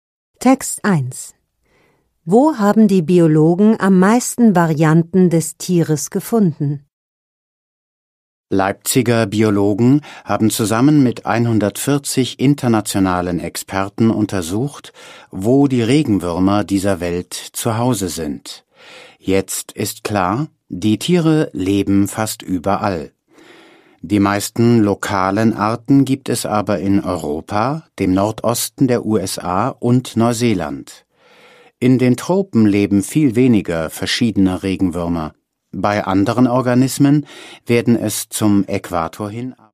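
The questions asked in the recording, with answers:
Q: Wo haben die Biologen am meisten Varianten des Tieres gefunden?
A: In Europa, im Nordosten der USA und in Neuseeland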